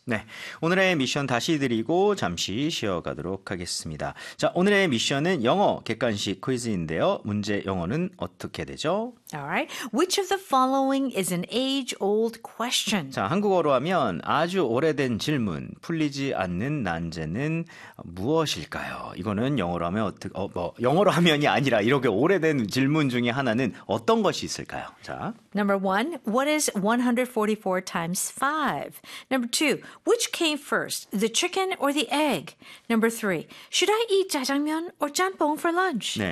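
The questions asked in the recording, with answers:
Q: Which of the following is an age-old question?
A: 2: which came first, the chicken or the egg?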